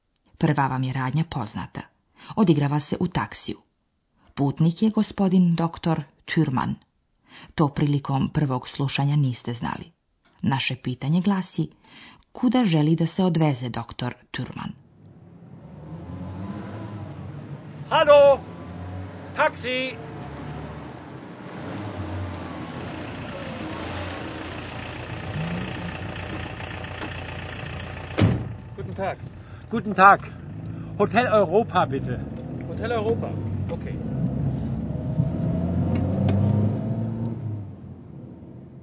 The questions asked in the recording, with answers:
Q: Naše pitanje glasi: kuda želi da se odveze doktor Türmann?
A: Gospodin Türmann bi želio da ga taksista odveze u Hotel Europu.